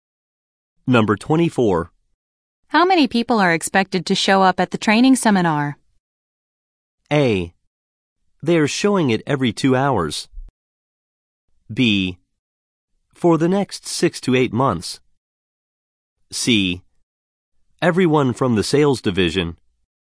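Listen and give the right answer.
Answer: C: Everyone from the sales division.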